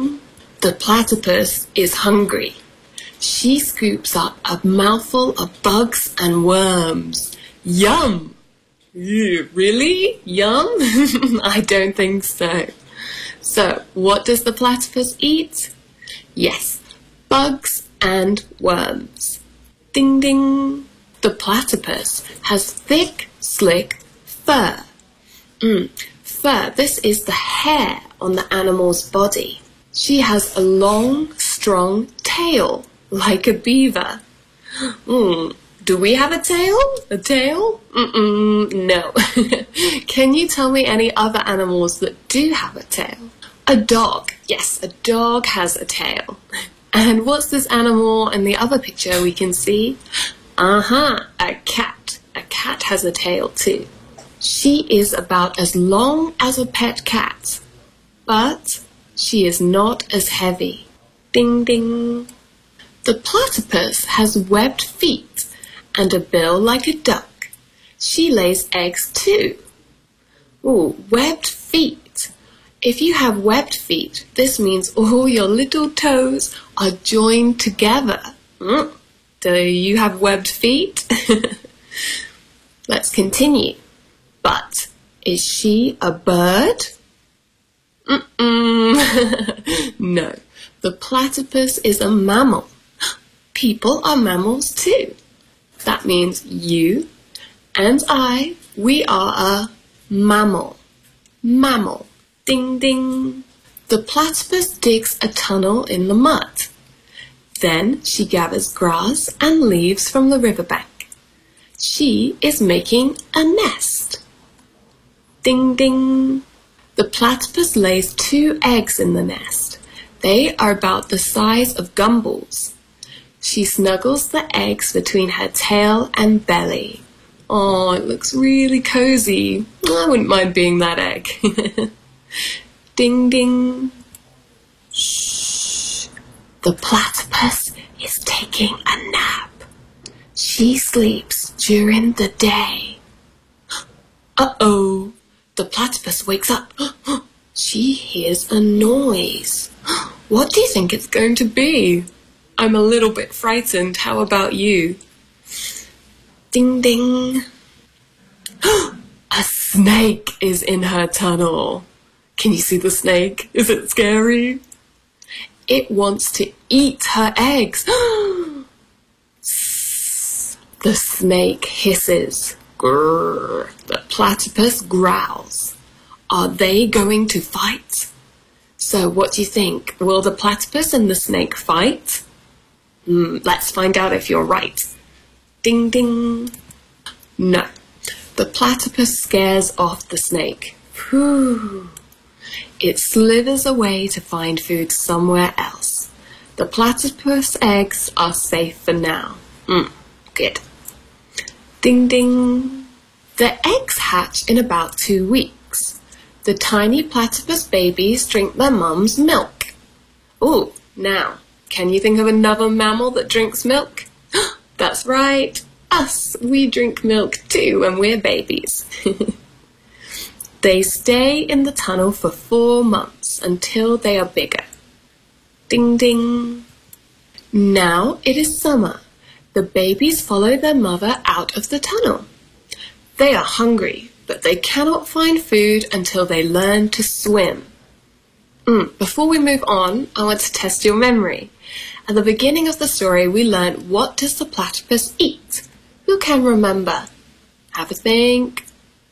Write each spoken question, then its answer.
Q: At the beginning of the story, we learned what does the platypus eat?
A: Good job. They eat bugs and worms.